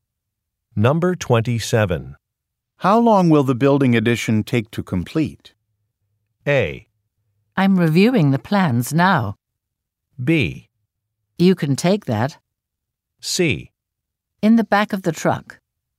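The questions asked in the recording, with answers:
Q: How long will the building addition take to complete?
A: A: I'm reviewing the plans now.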